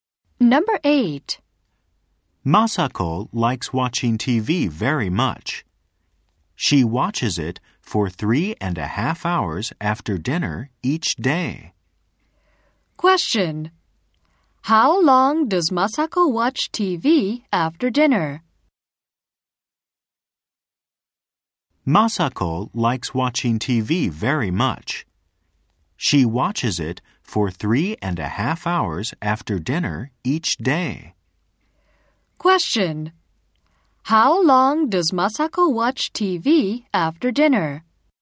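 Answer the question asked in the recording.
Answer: For 3.5 hours.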